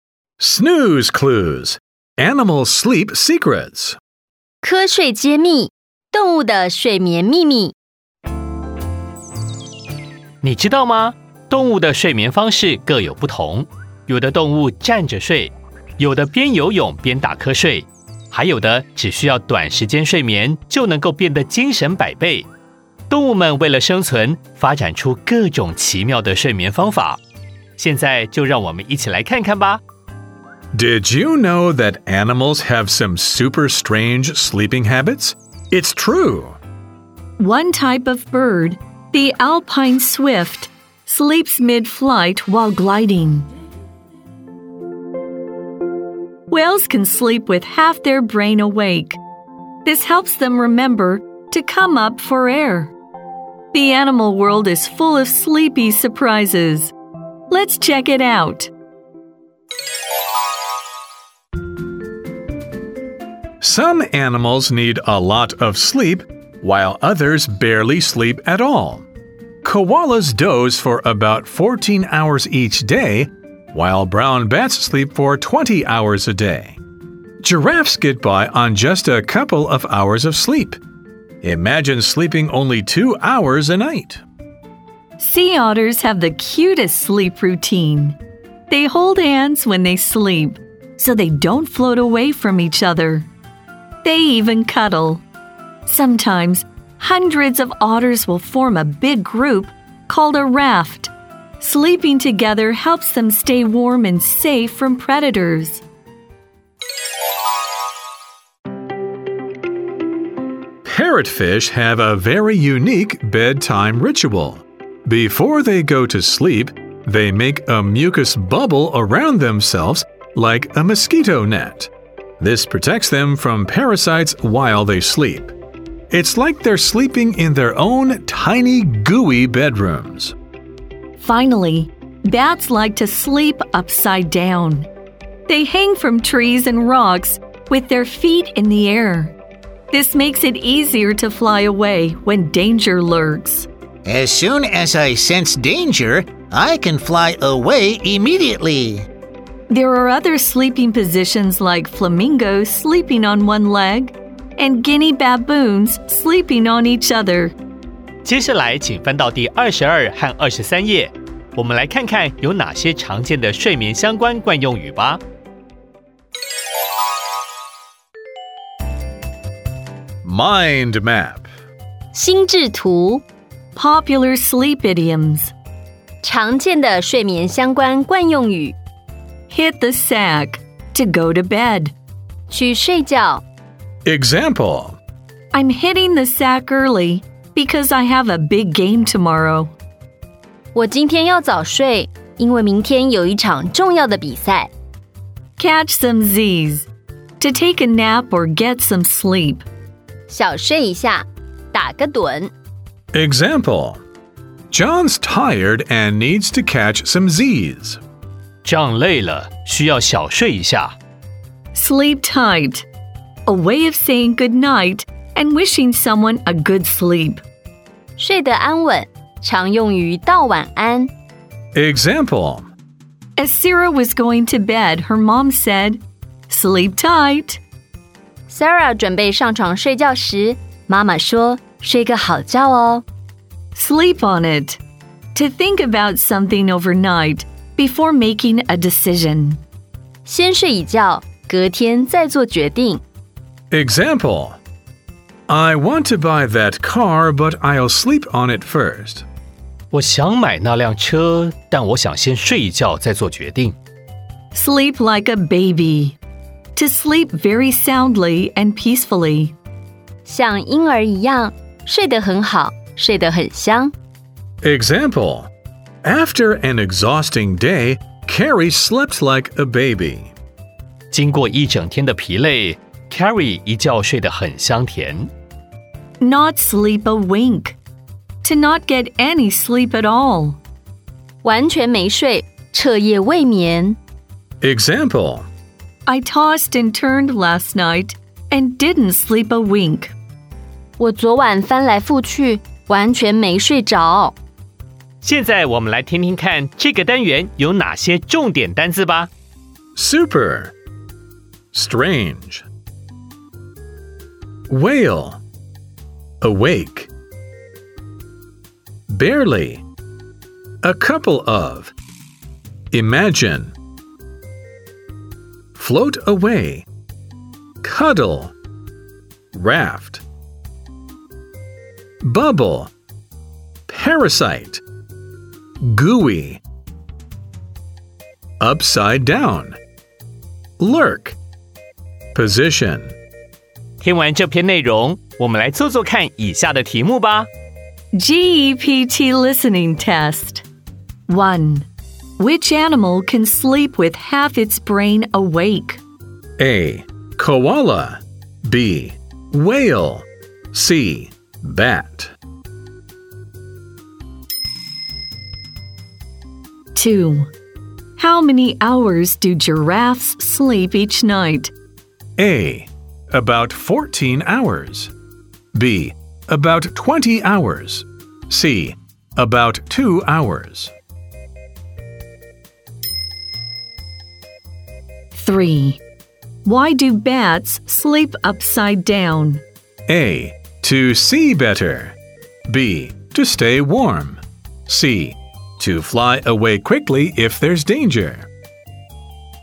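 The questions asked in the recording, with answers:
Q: Which animal can sleep with half its brain awake?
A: B: Whale.

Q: How many hours do giraffes sleep each night?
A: C: About 2 hours.

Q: Why do bats sleep upside down?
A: C: To fly away quickly if there's danger.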